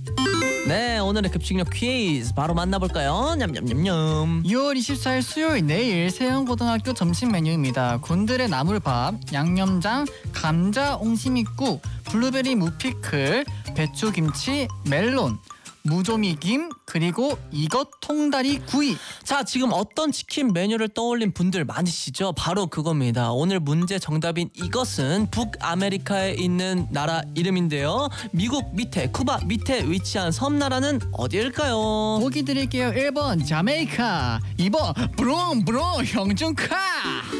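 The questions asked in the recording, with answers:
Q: 미국 밑에, 쿠바 밑에 위치한 섬나라는 어디일까요?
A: 1: 자메이카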